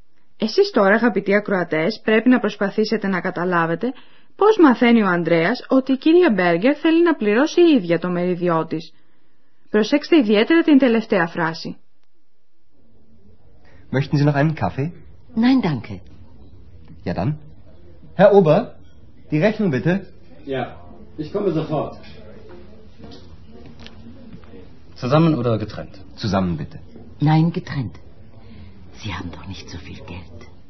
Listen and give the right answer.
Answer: Η κυρία Μπέργκερ θέλει να πληρώσει ίδια το φαγητό τη.